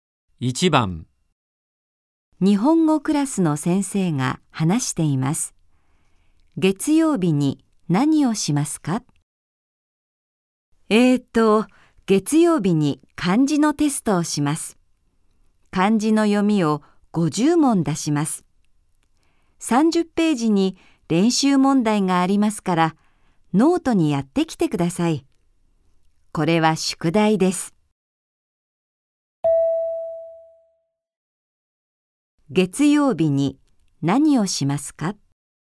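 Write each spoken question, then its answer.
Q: 月曜日に何をしますか?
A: 漢字のテスト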